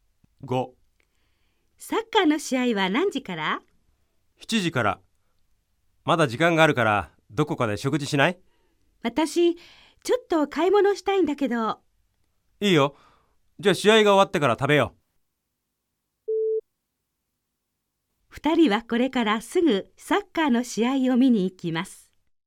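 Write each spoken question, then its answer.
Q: 二人はこれからすぐサッカーの試合を見に行きます。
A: ×(まず買い物をする)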